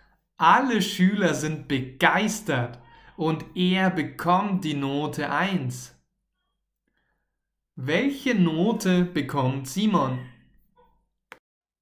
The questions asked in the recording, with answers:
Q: Welche Note bekommt Simon?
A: Die Note 1. Er bekommt die beste Note.